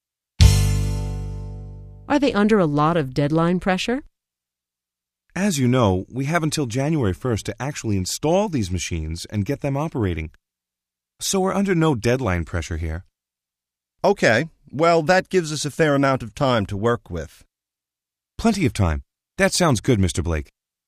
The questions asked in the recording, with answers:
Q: Are they under a lot of deadline pressure?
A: No, they aren't. They have plenty of time to install the robots.